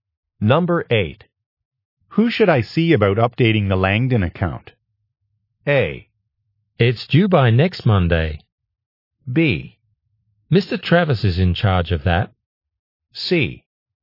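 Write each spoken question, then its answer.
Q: Who should I see about updating the Langdon account?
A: B: Mr. Travis is in charge of that.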